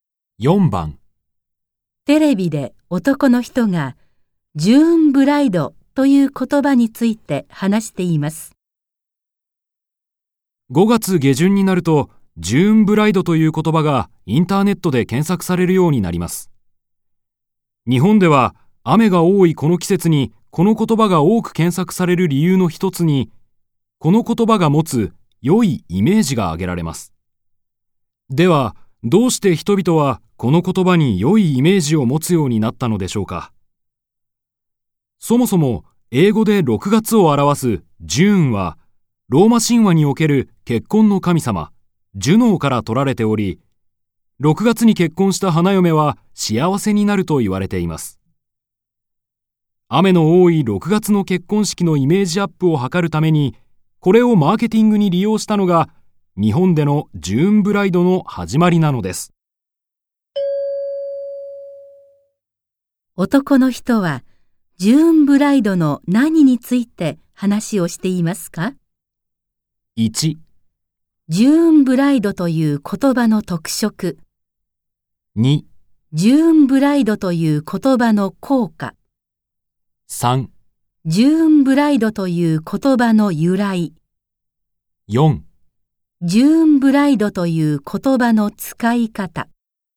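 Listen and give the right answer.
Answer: 3: ジューンブライドという言葉の由来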